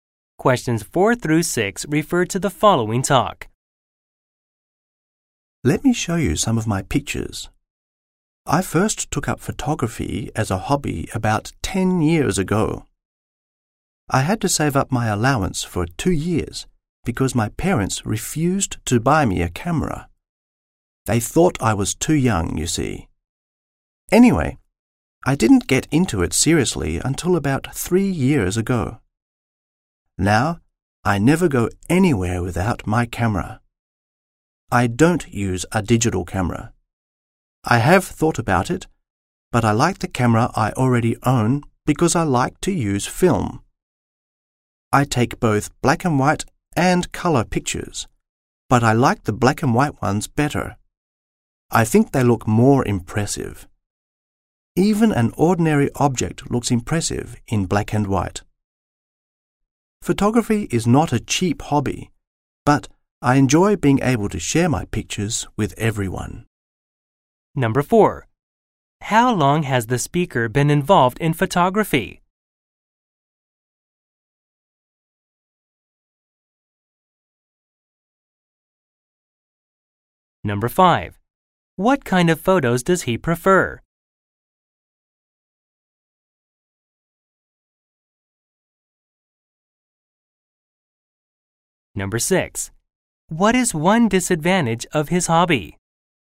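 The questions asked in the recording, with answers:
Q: How long has the speaker been involved in photography?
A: About 10 years

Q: What kind of photos does he prefer?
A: Black and white photos

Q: What is one disadvantage of his hobby?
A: It is not cheap.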